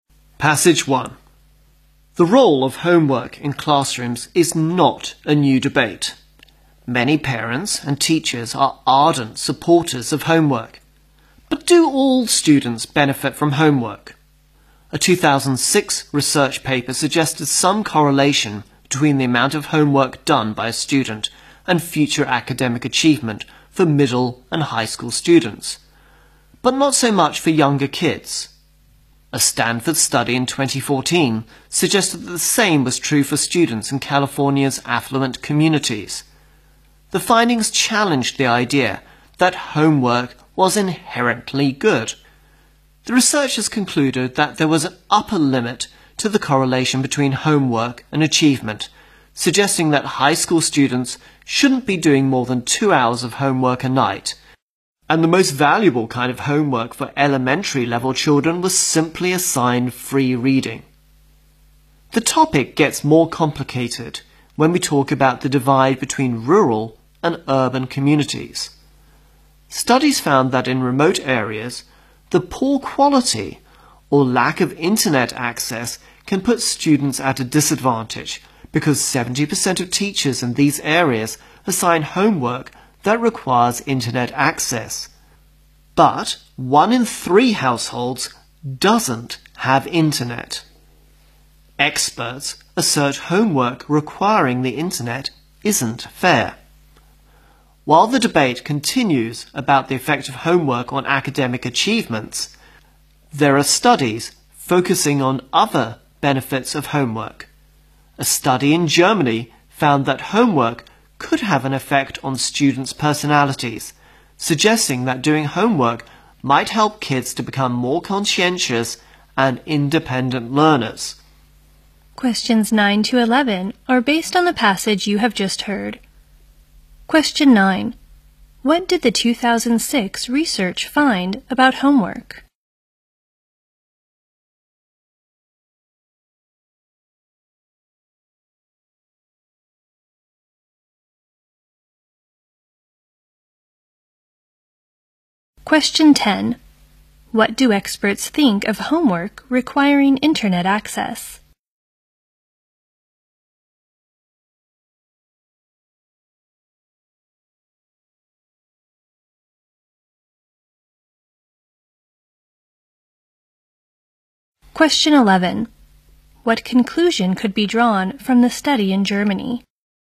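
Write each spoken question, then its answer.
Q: What did the 2006 research find about homework?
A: The amount of homework was linked to later academic achievement for middle and high school students, but not much for younger children.

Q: What do experts think of homework requiring internet access?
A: It isn't fair.

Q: What conclusion could be drawn from the study in Germany?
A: Homework may help children become more conscientious and independent learners.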